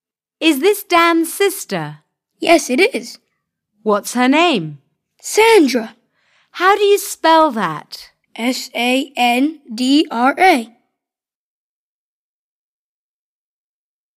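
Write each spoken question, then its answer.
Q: What's her name?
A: Sandra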